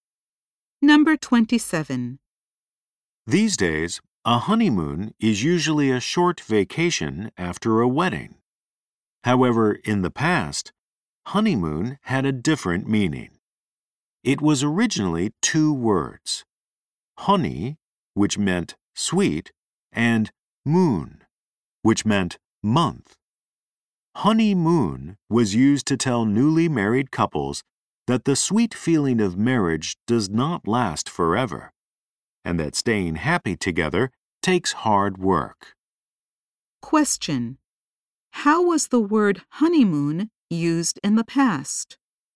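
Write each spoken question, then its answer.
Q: How was the word honeymoon used in the past?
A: To tell newly married couples that the sweet feeling of marriage does not last and staying happy takes hard work.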